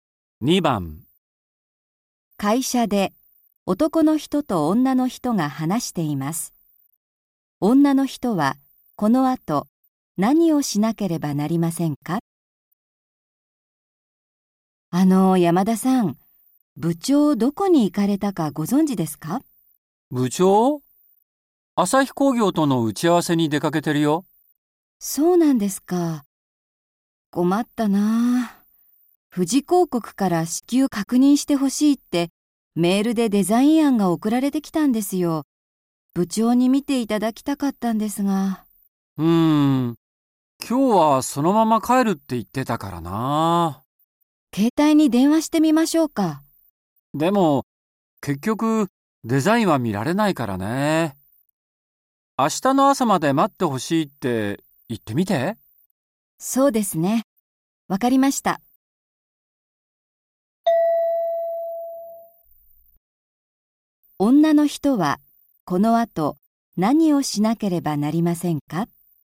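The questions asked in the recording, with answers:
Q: 女の人はこの後何をしなければなりませんか?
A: 富士広告に明日の朝まで待ってほしいと連絡する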